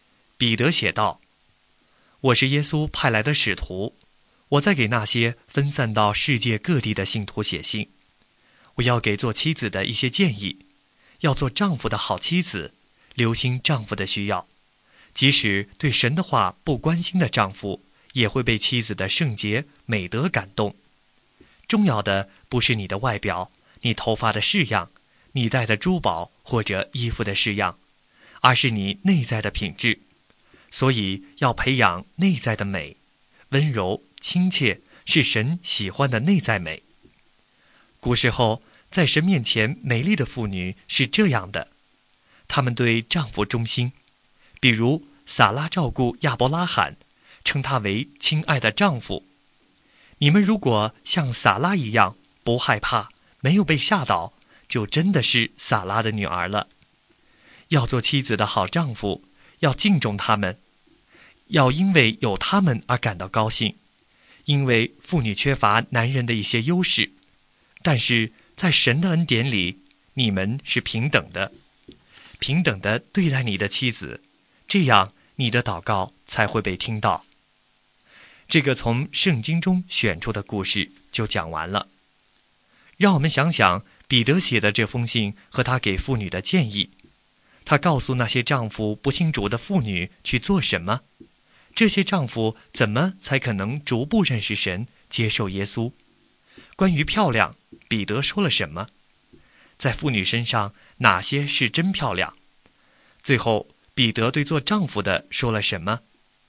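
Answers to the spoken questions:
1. 重要的不是外表、发型、珠宝或衣服,而是内在的品质
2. 温柔亲切的内在美
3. 他说丈夫要敬重他们自己的妻子,要因为有他们而高兴,要认识到在神眼中他们是平等的。他鼓励丈夫尊重妻子。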